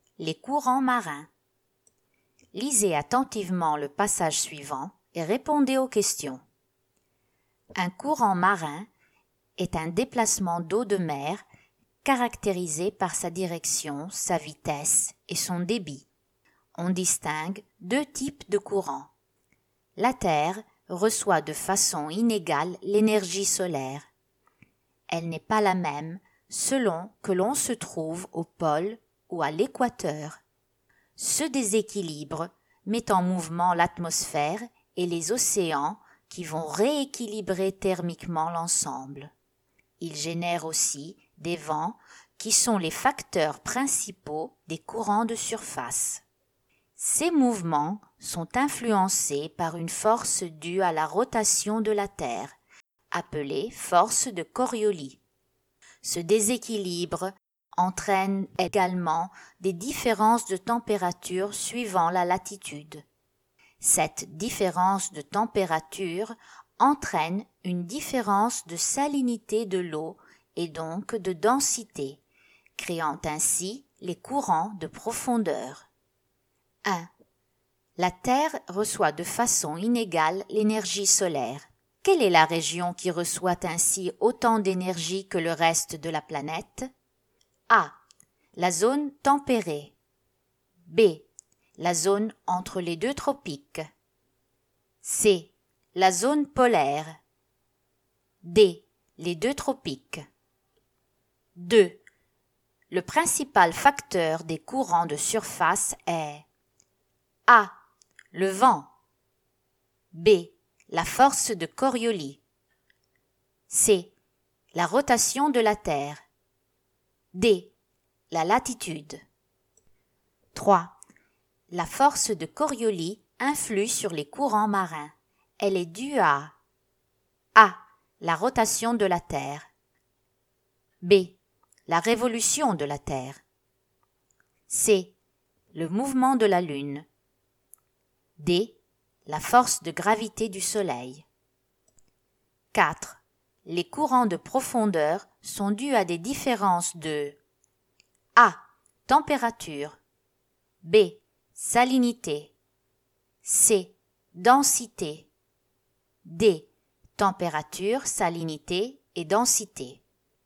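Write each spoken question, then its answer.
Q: Le principal facteur des courants de surface est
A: A: Le vent.

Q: La force de Coriolis influe sur les courants marins. Elle est due à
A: A: La rotation de la Terre.

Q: Les courants de profondeur sont dus à des différences de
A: D: Température, salinité et densité.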